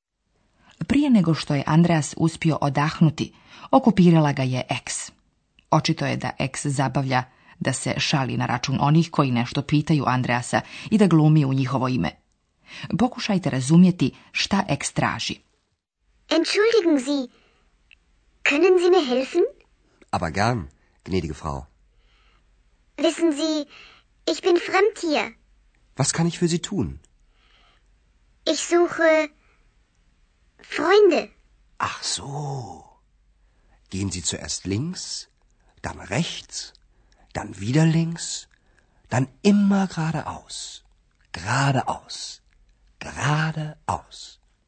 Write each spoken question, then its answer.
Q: Pokušajte razumjeti šta ex traži.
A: Na to mu ex reče, tražim prijatelje.